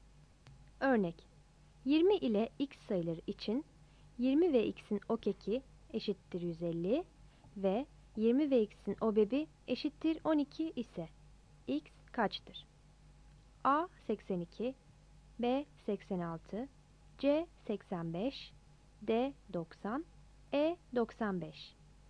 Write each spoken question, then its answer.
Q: 20 ile x sayıları için 20 ve x'in okeki eşittir 150 ve 20 ve x'in obebi eşittir 12 ise x kaçtır?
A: X eşittir 90. Yanıt D'dir.